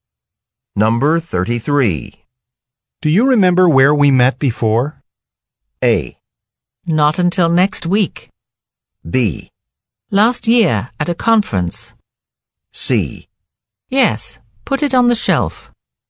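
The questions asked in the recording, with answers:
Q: Do you remember where we met before?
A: B: Last year, at a conference.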